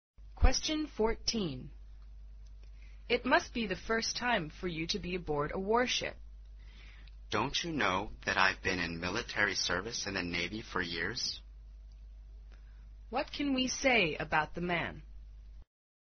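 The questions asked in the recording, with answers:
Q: What can we say about the man?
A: He has served in the Navy for years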